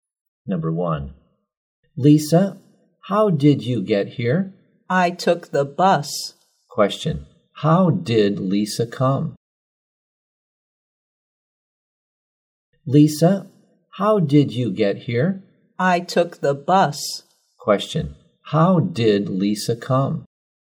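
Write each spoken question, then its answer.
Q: Question, how did Lisa come?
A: By bus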